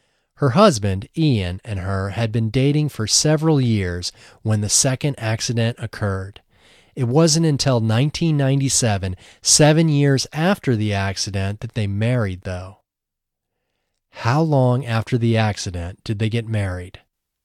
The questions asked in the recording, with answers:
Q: How long after the accident did they get married?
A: They got married 7 years after the accident.